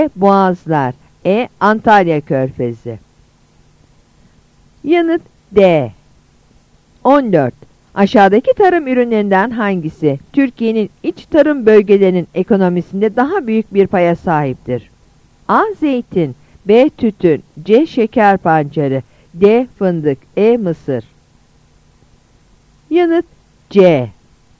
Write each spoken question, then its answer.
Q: Aşağıdaki tarım ürünlerinden hangisi Türkiye'nin iç tarım bölgelerinin ekonomisinde daha büyük bir paya sahiptir?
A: Yanıt C.